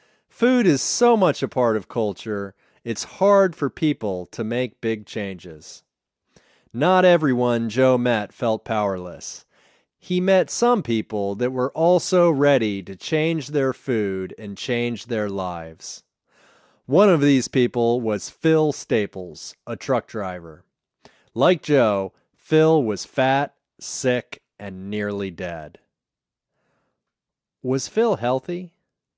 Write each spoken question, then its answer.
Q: Was Phil healthy?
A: No, Phil wasn't healthy. Phil was fat, sick, and nearly dead.